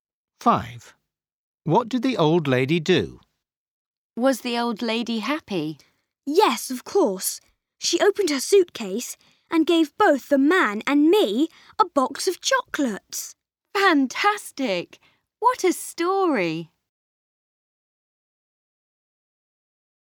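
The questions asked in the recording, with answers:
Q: What did the old lady do?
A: She gave the man and Max a box of chocolates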